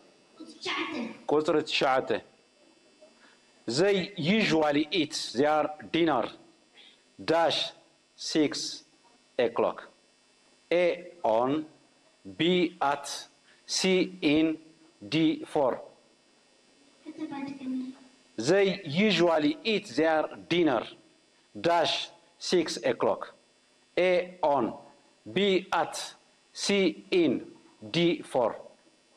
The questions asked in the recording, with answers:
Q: They usually eat their dinner dash 6 o'clock.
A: At, correct.